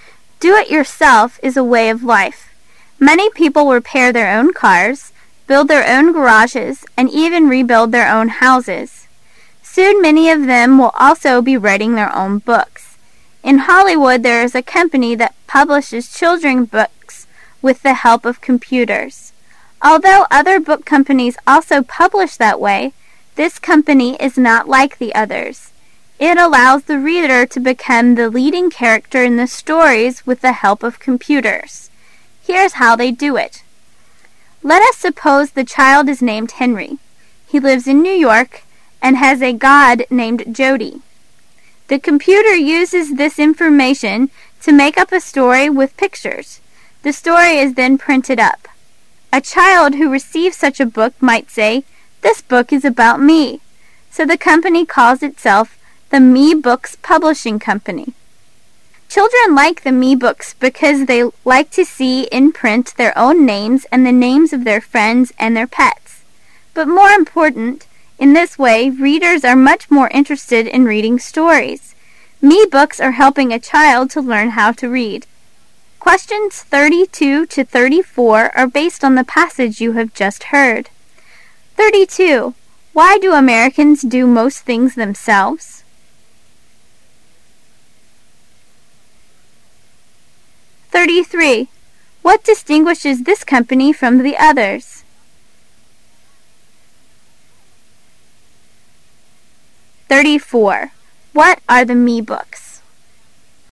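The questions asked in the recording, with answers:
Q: Why do Americans do most things themselves?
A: Because labor costs are so high.

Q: What distinguishes this company from the others?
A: It lets the reader become the leading character in the stories.

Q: What are the Me Books?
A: Computer-made children's books in which the reader is the main character.

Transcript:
[解析] 32-34 In America, where labor costs are so high, "do it yourself" is a way of life. Many people repair their own cars, build their own garages, and even rebuild their own houses. Soon many of them will also be writing their own books. In Hollywood there is a company that publishes children's book with the help of computers. Although other book companies also publish that way, this company is not like the others. It allows the reader to become the leading character in the stories with the help of computers. Here is how they do it. 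Let us suppose the child is named Henry. He lives in New York, and has a god named Jody. The computer uses this information to make up a story with pictures. The story is then printed up. A child who receives such a book might say, "This book is about me." So the company calls itself the "Me-Books Publishing Company". Children like the Me-Books because they like to see in print their own names and the names of their friends and their pets. But more important, in this way, readers are much more interested in reading the stories. Me-Books are helping a child to learn how to read.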